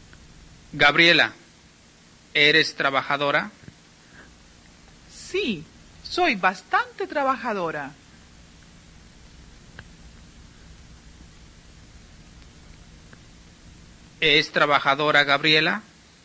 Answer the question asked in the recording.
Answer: Sí, Gabriela es bastante trabajadora.